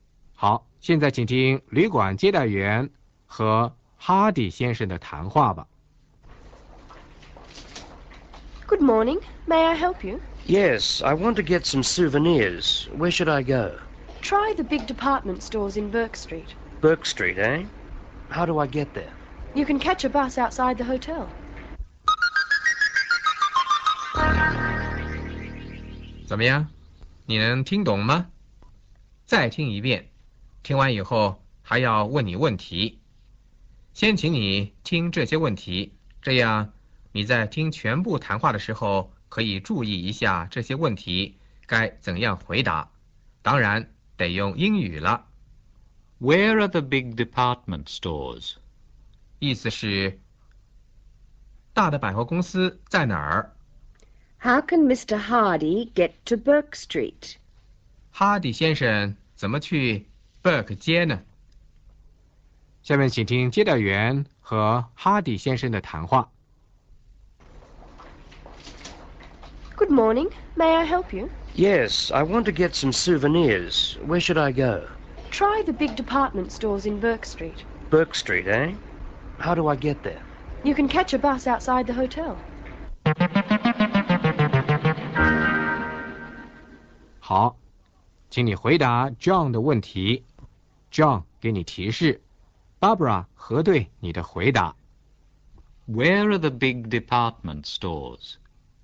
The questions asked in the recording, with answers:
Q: Where are the big department stores?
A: In Burke Street.

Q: How can Mr. Hardy get to Burke Street?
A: He can catch a bus outside the hotel.